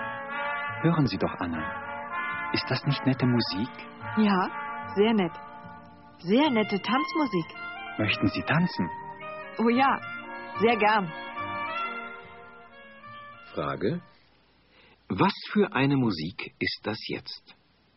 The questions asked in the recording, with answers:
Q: Was für eine Musik ist das jetzt?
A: Das ist Tanzmusik.